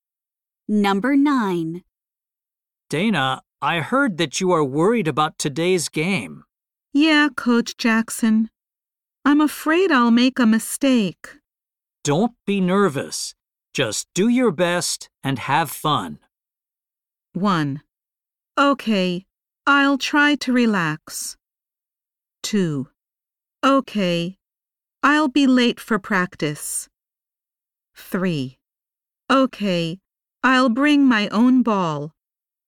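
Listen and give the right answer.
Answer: 1: Okay, I'll try to relax.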